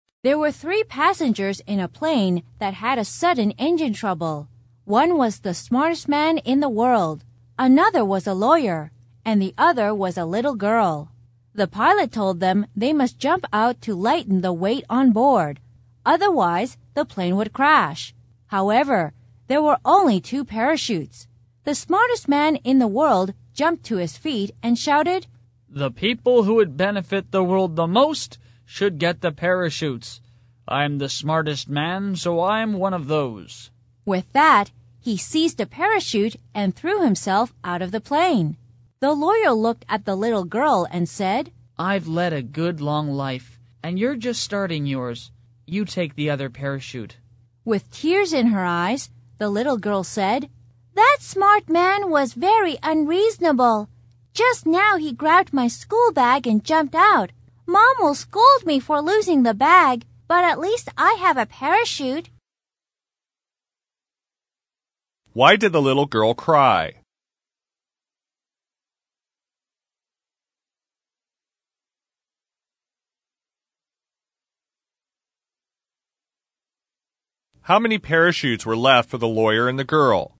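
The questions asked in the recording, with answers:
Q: How many parachutes were left for the lawyer and the girl?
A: Two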